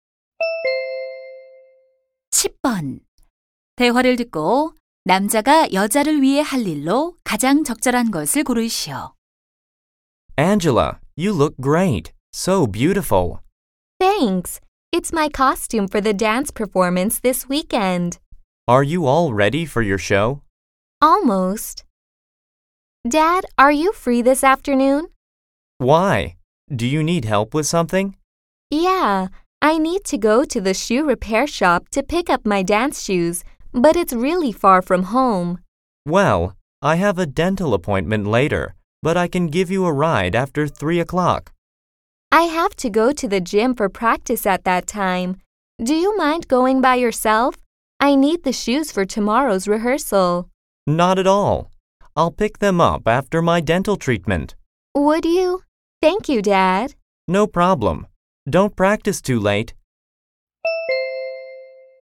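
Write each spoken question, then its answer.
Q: 대화를 듣고 남자가 여자를 위해 할 일로 가장 적절한 것을 고르시오.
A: 수선된 댄스화 찾아오기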